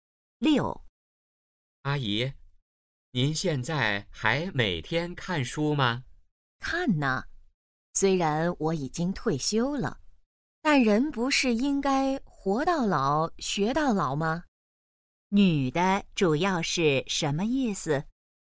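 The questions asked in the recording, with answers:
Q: 女的主要是什么意思?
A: 活到老学到老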